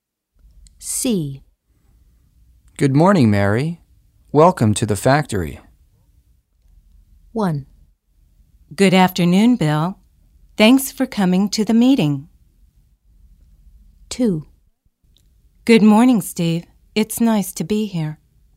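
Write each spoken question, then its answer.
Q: Good morning, Mary. Welcome to the factory.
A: 2: Good morning, Steve. It's nice to be here.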